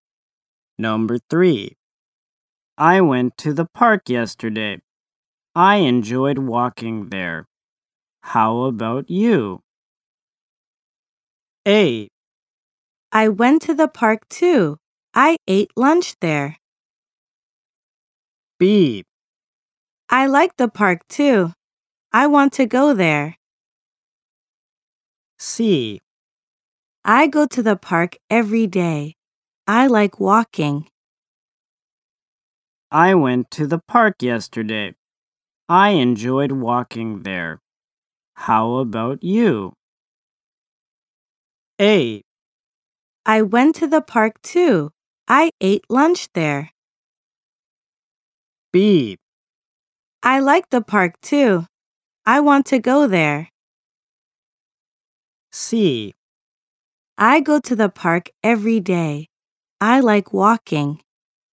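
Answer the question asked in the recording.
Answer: A: I went to the park too. I ate lunch there.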